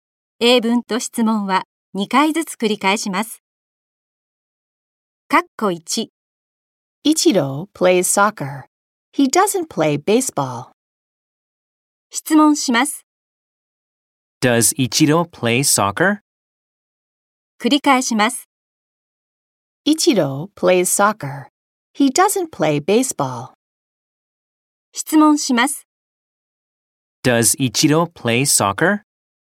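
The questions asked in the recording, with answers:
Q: Does Ichiro play soccer?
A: Yes, he does.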